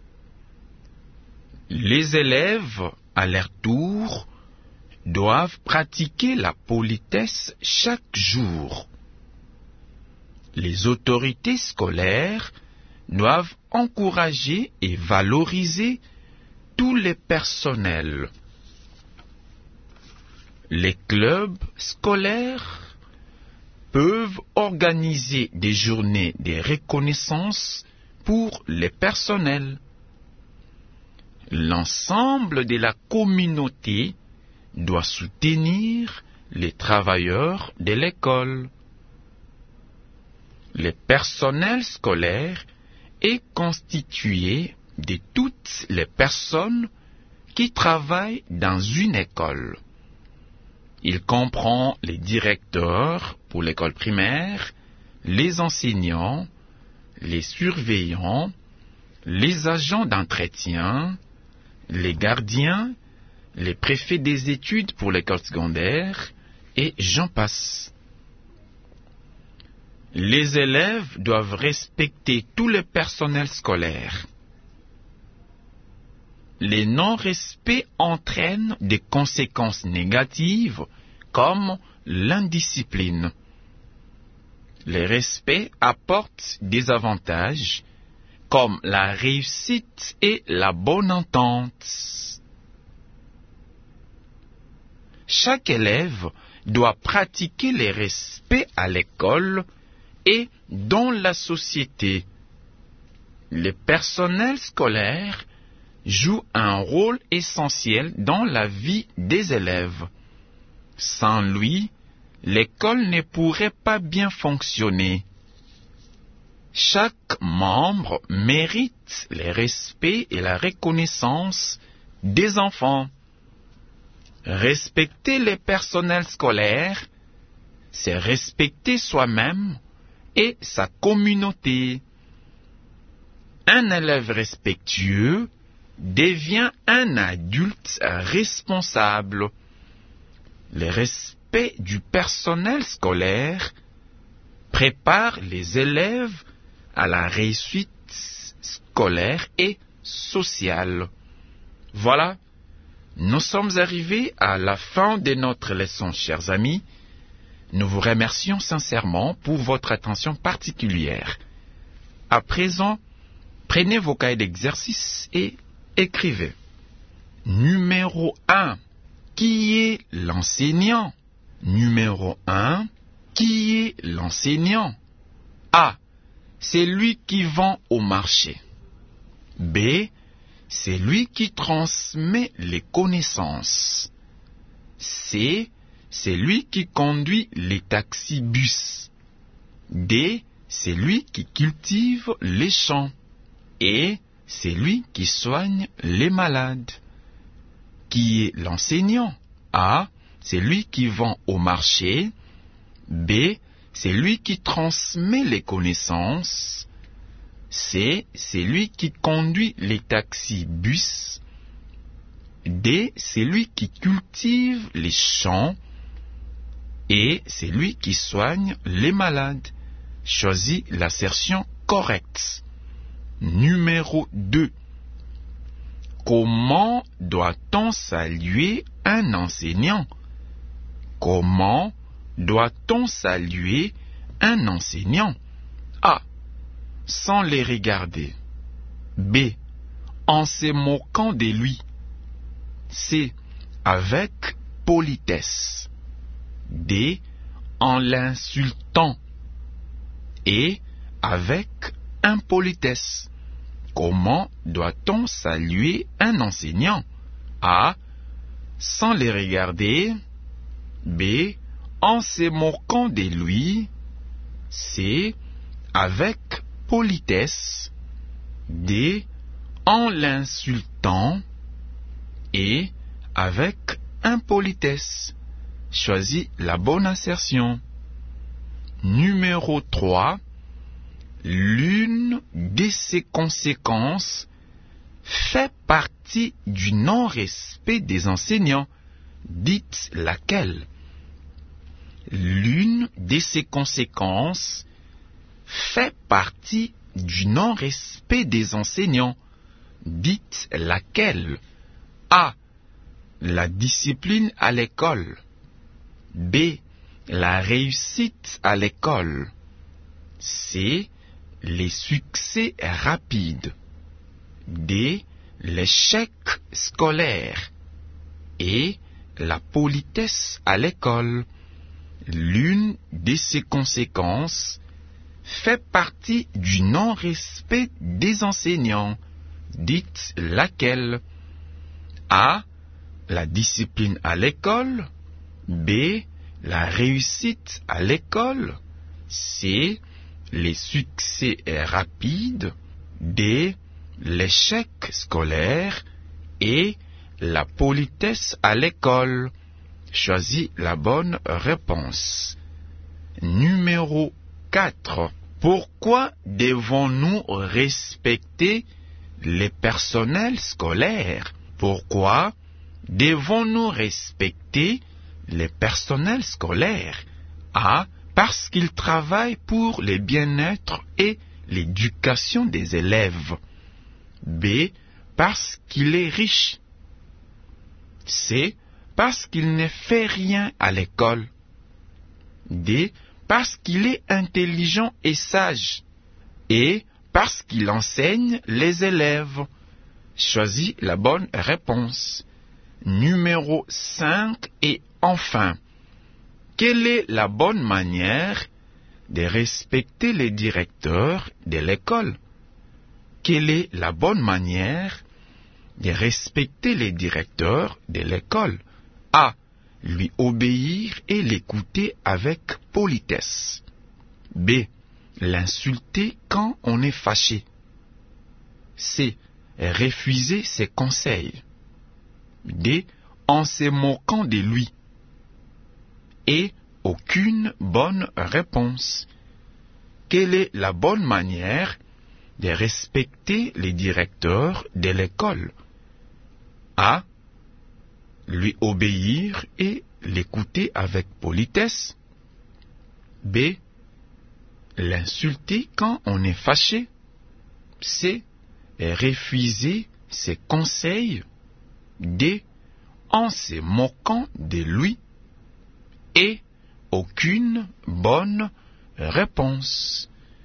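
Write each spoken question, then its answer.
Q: Comment doit-on saluer un enseignant?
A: C: Avec politesse.

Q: L'une de ses conséquences fait partie du non-respect des enseignants. Dites laquelle?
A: D: L'échec scolaire.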